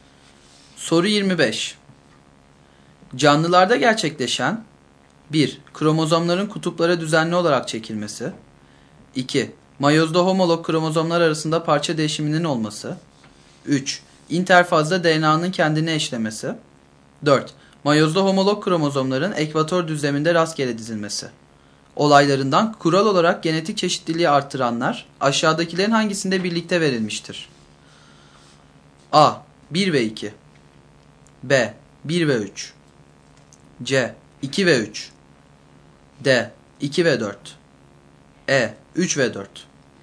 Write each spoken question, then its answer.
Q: Olaylarından kural olarak genetik çeşitliliği artıranlar aşağıdakilerin hangisinde birlikte verilmiştir?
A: Doğru yanıt D şıkkı.